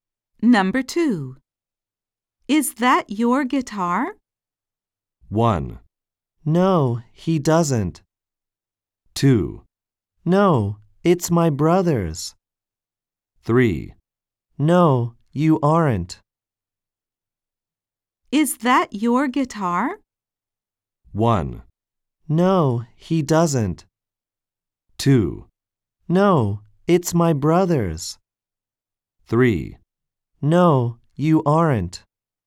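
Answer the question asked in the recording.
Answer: 2: No, it's my brother's.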